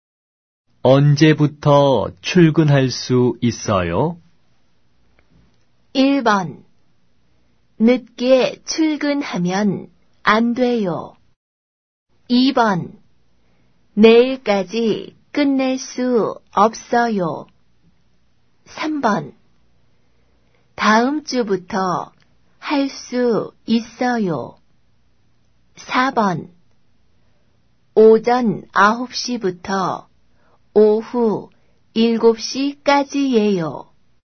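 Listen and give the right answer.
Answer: 3: 다음 주부터 할 수 있어요.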